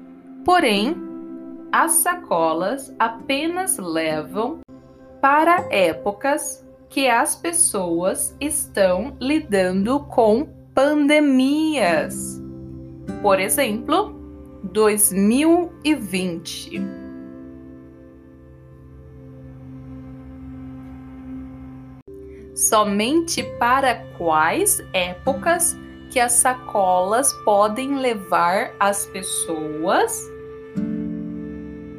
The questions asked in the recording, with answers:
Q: Somente para quais épocas que as sacolas podem levar as pessoas?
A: somente para épocas que as pessoas estão lidando com pandemias.